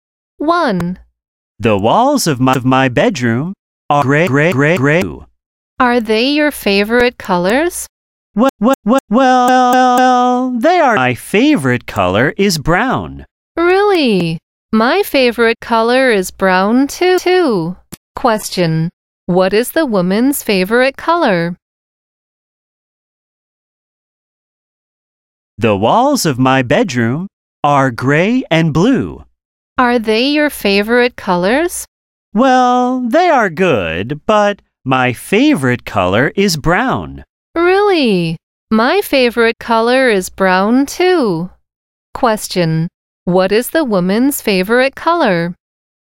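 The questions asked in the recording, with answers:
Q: What is the woman's favorite color?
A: Brown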